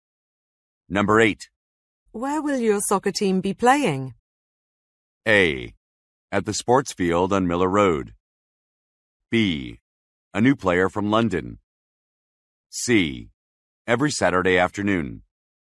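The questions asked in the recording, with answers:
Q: Where will your soccer team be playing?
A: A: At the sports field on Miller Road.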